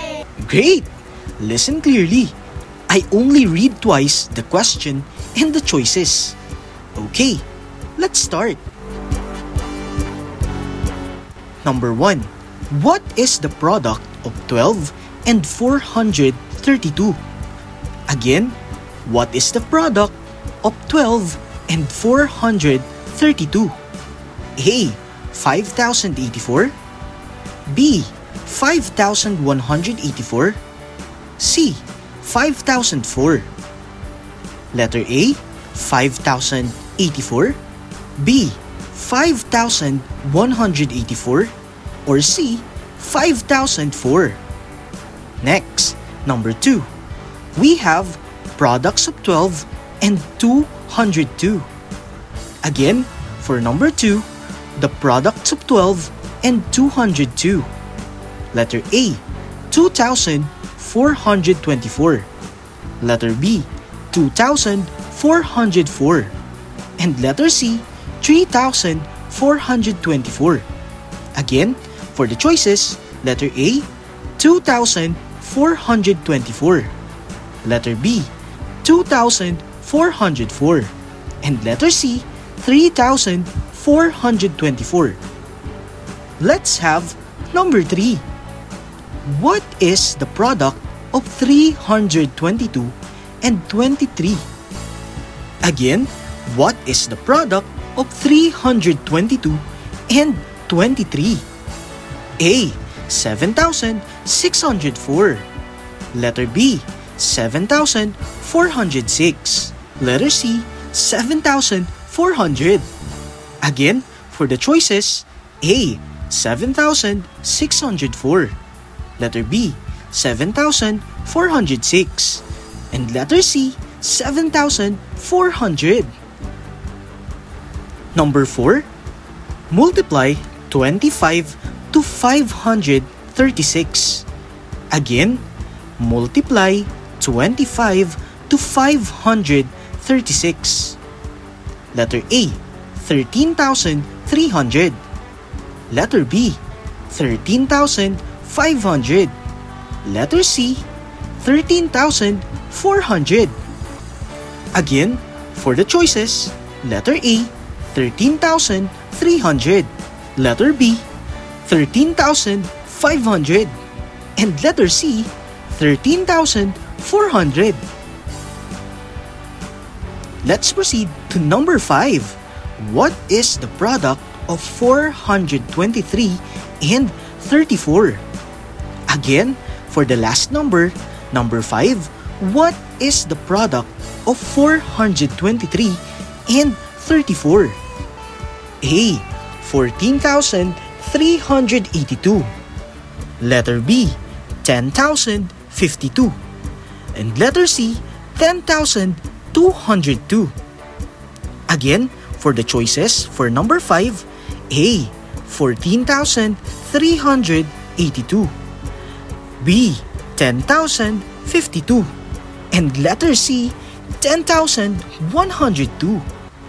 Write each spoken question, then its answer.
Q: What is the product of 12 and 432?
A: For number 1, the answer is letter B,

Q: We have products of 12 and 202.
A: The answer is letter A,

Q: What is the product of 322 and 23?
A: The answer is letter B,

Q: Multiply 25 to 536.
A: The answer is 13,400.

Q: What is the product of 423 and 34?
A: The answer is letter A,